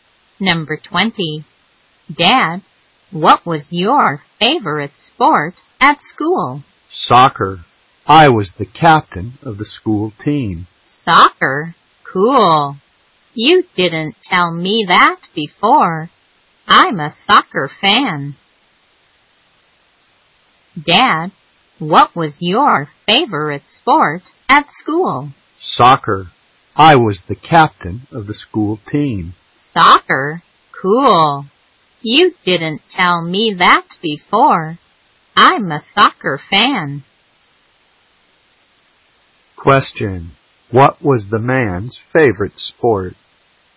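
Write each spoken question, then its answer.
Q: What was the man's favorite sport?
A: Soccer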